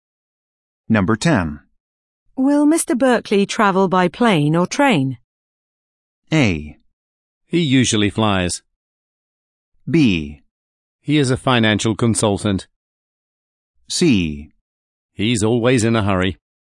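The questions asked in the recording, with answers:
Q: Will Mr. Berkeley travel by plane or train?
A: A: He usually flies.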